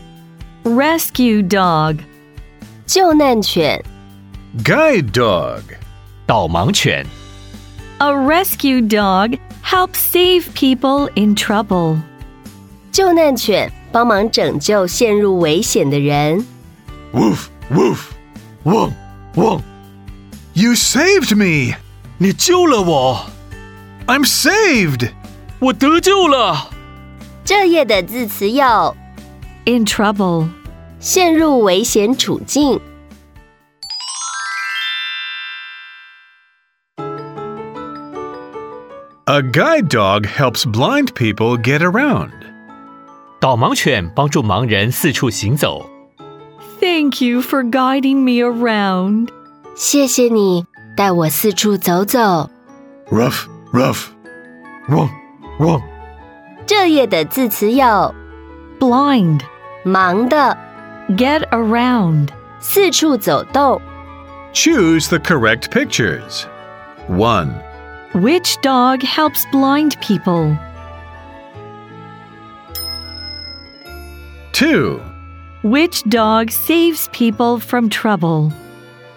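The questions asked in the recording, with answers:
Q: Which dog helps blind people?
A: A guide dog

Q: Which dog saves people from trouble?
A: A rescue dog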